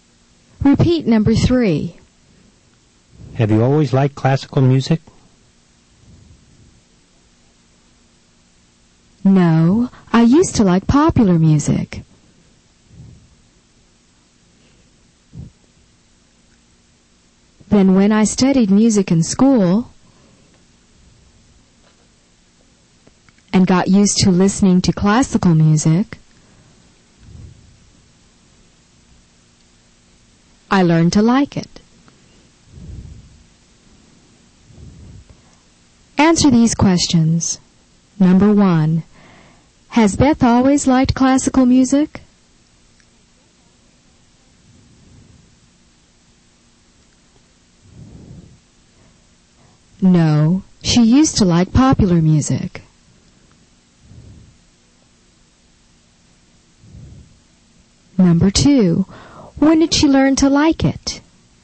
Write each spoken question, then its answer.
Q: When did she learn to like it?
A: She learned to like it